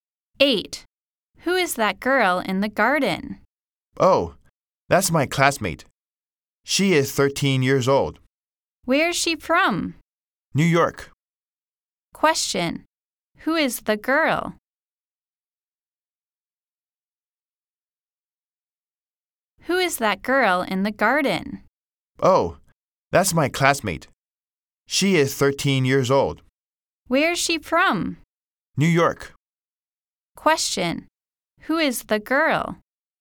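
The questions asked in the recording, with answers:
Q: Question. Who is the girl?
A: The speaker's classmate, 13 years old, from New York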